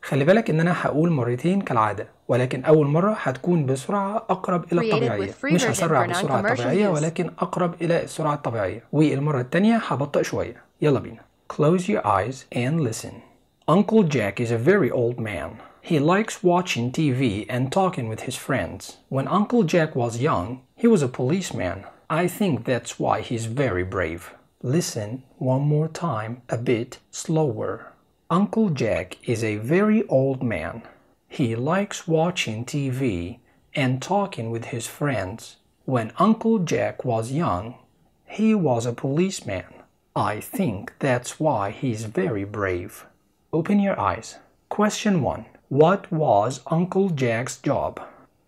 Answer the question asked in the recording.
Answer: He was a policeman.